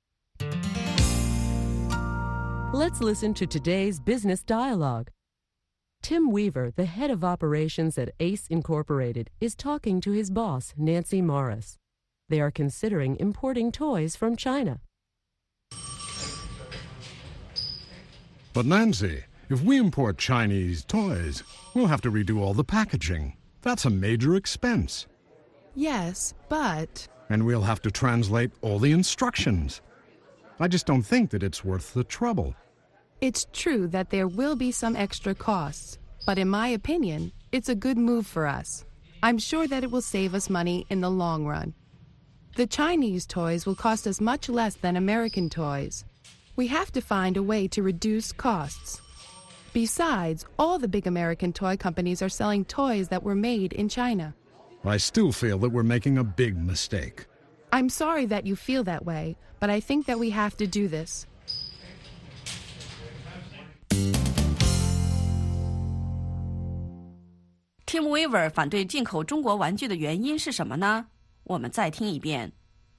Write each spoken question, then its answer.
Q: Tim Weaver 反对进口中国玩具的原因是什么呢?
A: 如果我们从中国进口玩具,我们必须要进行重新包装。这是 Tim Weaver 反对进口中国玩具的原因之一。